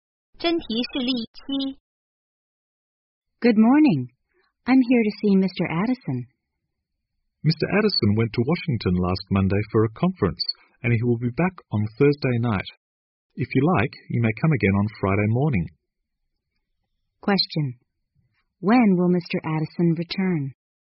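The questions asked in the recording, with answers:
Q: Question. When will Mr. Addison return?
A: On Thursday night.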